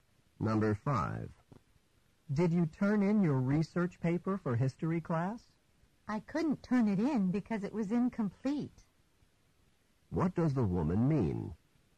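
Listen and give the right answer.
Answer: She didn't turn it in because it wasn't finished.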